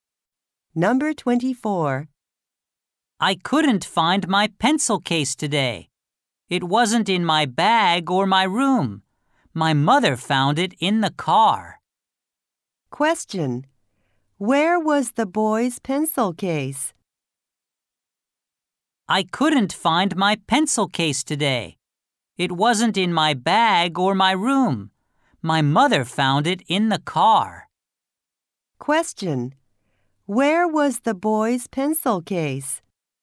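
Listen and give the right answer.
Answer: In the car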